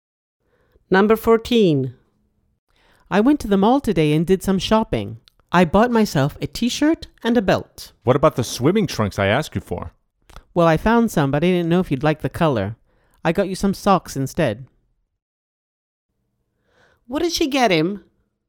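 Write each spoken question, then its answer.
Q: What did she get him?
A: Socks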